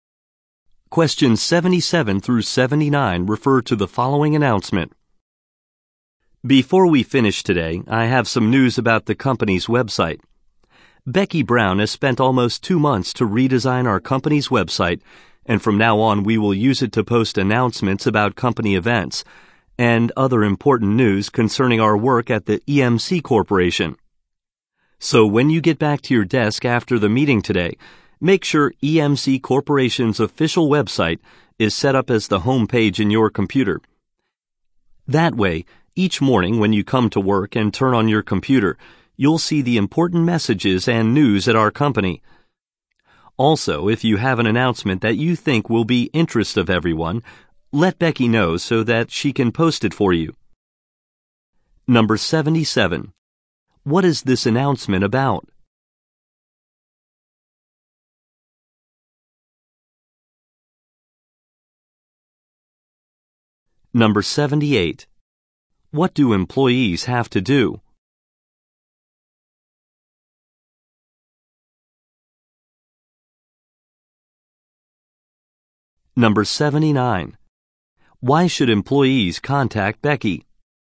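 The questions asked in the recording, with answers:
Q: What is this announcement about?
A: The redesigned company website.

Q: What do employees have to do?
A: Set the company website as their home page.

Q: Why should employees contact Becky?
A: To have announcements posted.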